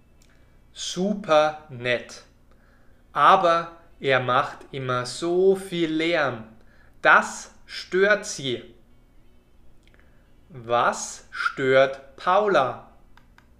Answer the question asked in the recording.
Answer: Sie stört, dass Ivan immer so viel Lärm macht.